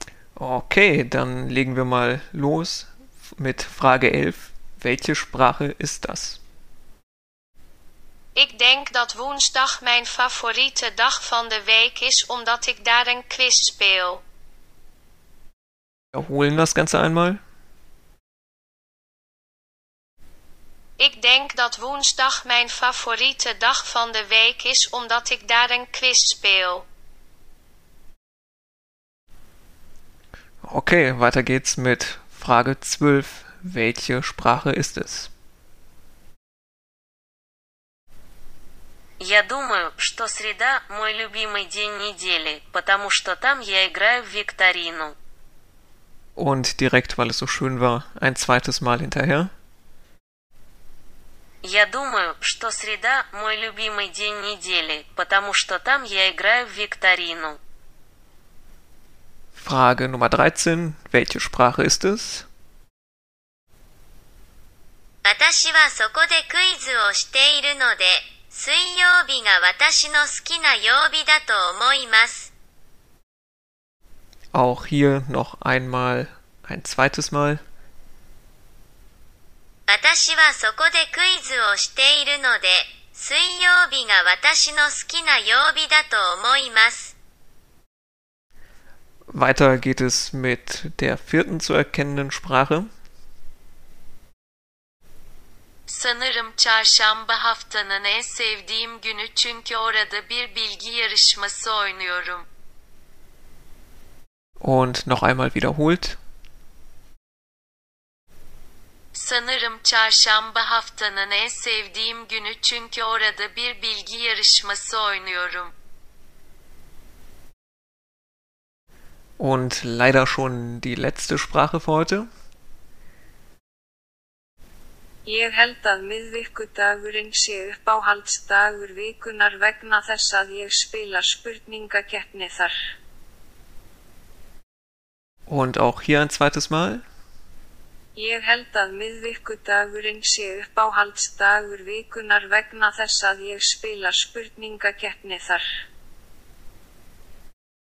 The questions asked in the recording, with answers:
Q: Welche Sprache ist es?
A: Lösung 12. Das war Russisch.

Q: Welche Sprache ist es?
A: Lösung 13 war Japanisch.

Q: weiter geht es mit der vierten zu erkennenden Sprache.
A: Lösung Nummer 14 war Türkisch.

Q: Und leider schon die letzte Sprache für heute.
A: Isländisch.